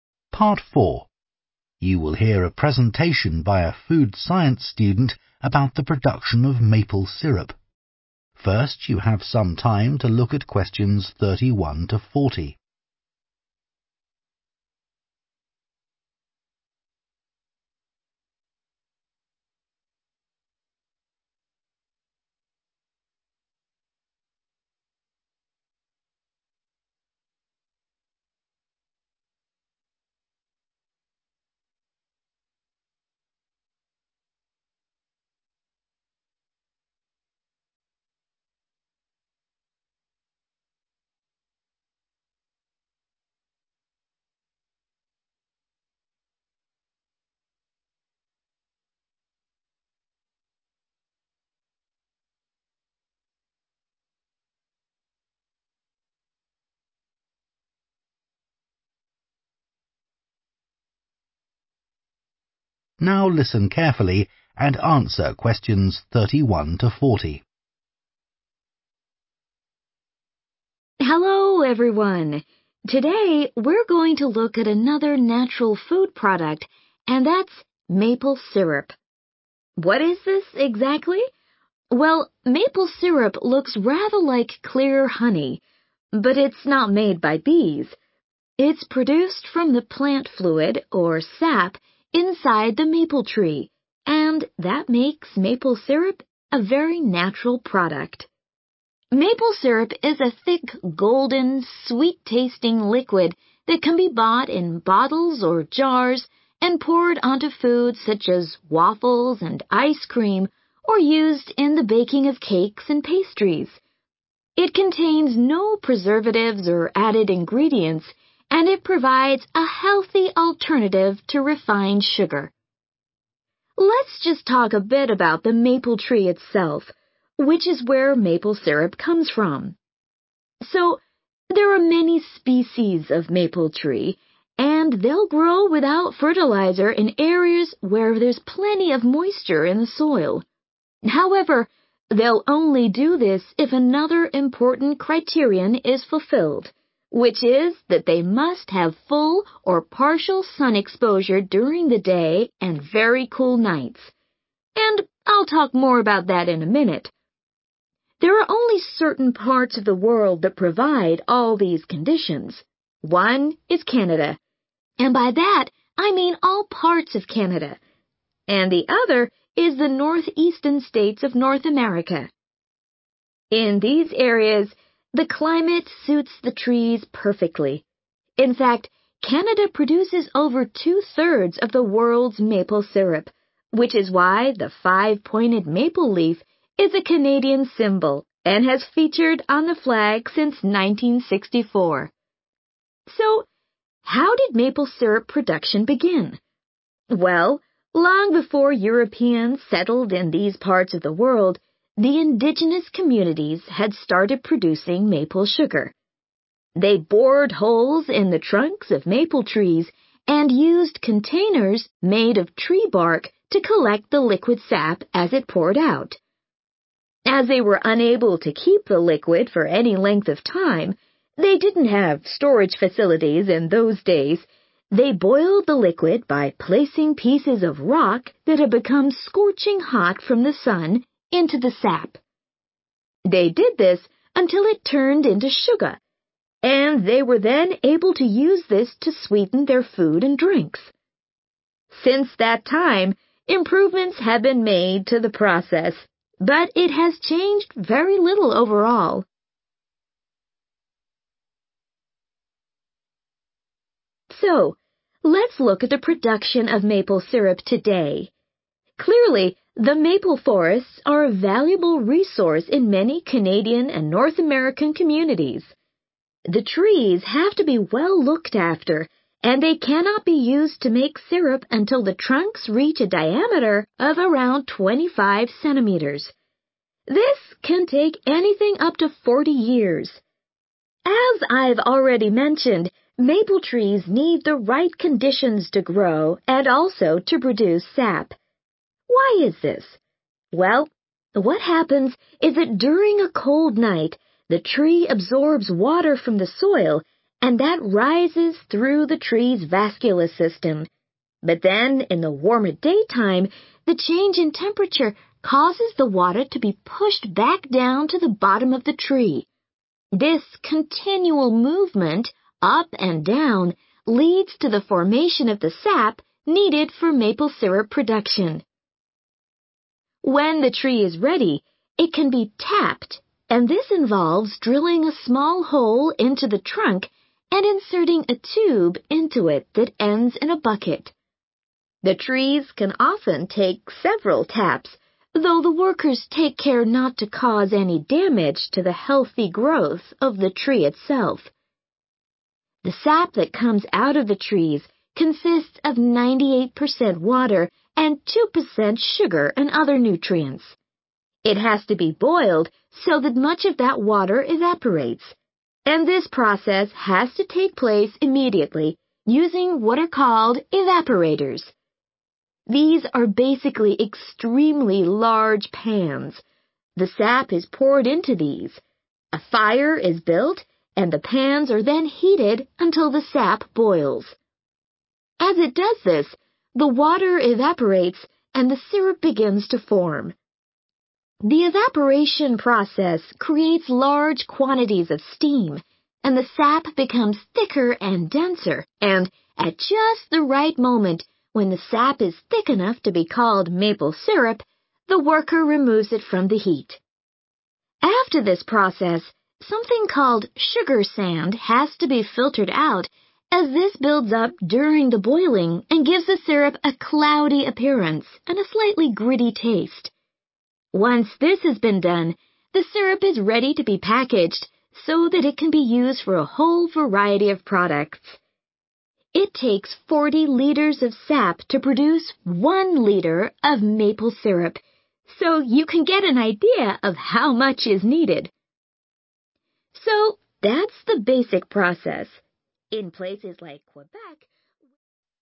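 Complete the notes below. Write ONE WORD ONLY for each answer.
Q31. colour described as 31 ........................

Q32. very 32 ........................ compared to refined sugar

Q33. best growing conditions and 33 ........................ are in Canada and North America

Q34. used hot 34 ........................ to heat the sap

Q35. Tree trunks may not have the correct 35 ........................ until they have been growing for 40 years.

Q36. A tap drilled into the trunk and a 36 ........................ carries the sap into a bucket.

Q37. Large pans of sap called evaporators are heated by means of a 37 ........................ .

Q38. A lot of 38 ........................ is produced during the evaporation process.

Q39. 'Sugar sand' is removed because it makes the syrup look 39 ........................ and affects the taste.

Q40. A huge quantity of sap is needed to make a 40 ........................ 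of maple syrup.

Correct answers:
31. golden
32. healthy
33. climate
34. rock
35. diameter
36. tube
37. fire
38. steam
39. cloudy
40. litre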